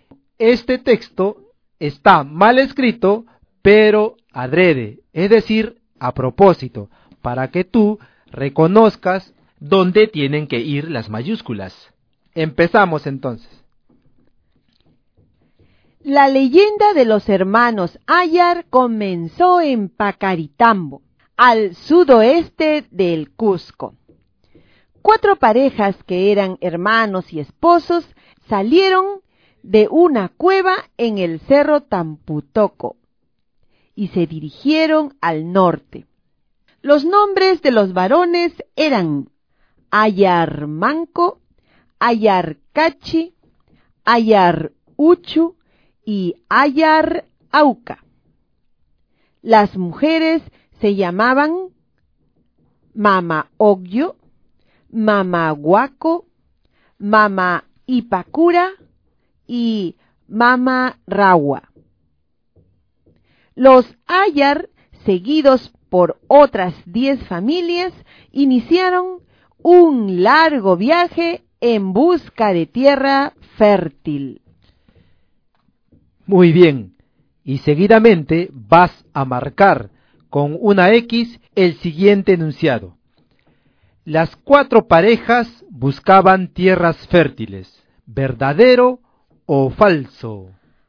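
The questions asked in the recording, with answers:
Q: Las cuatro parejas buscaban tierras fértiles, ¿verdadero o falso?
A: Verdadero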